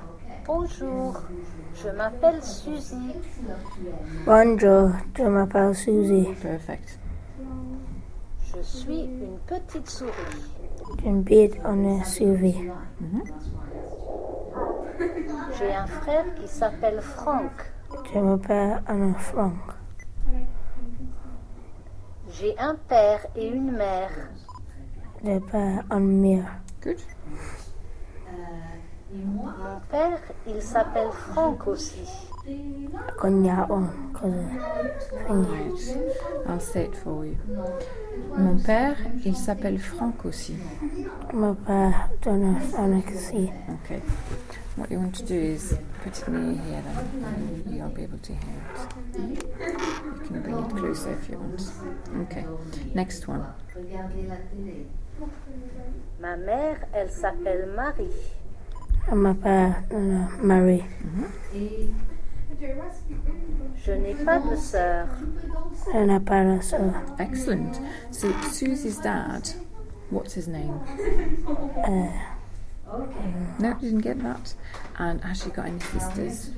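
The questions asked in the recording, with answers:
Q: So, Susie's dad, what's his name?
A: Frank

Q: And has she got any sisters?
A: No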